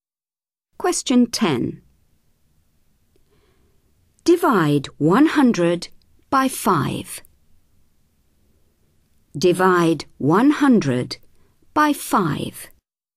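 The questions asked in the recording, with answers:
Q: Divide 100 by 5.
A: 20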